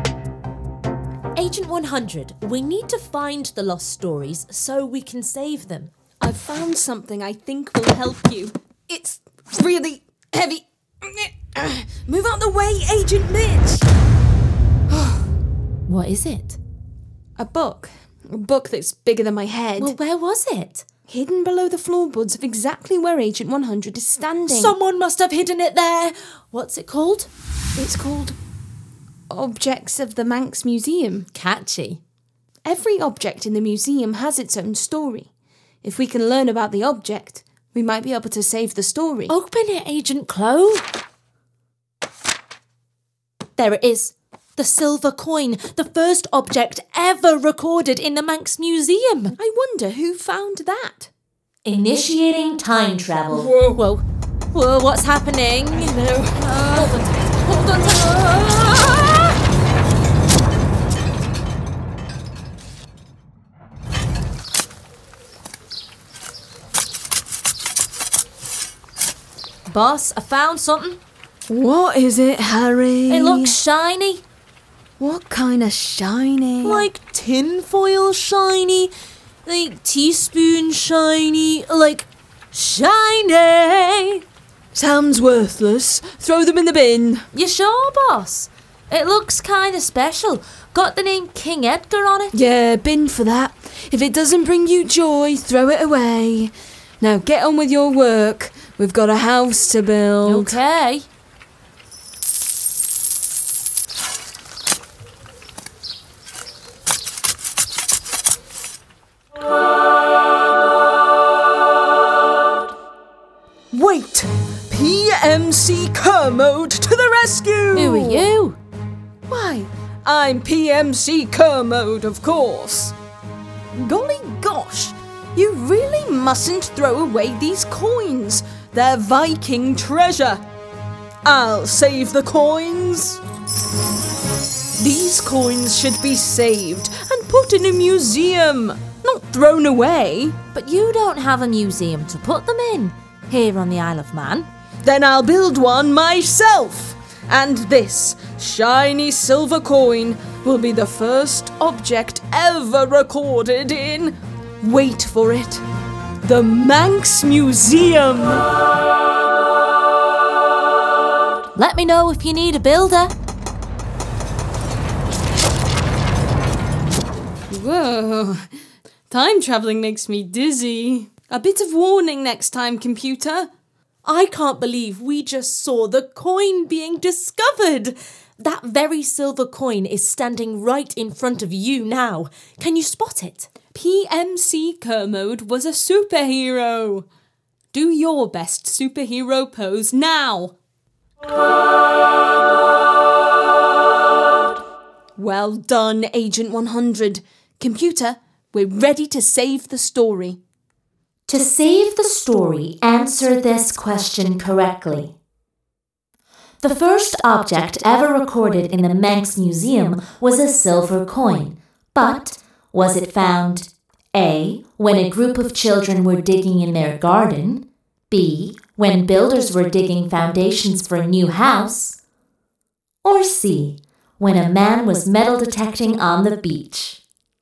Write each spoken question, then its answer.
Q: But was it found A. when a group of children were digging in their garden, B. when builders were digging foundations for a new house, or C. when a man was metal detecting on the beach?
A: Correct! The answer is B.